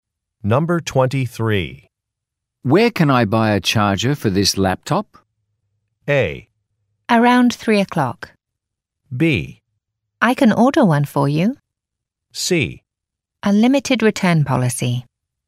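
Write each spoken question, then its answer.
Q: Where can I buy a charger for this laptop?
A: B: I can order one for you.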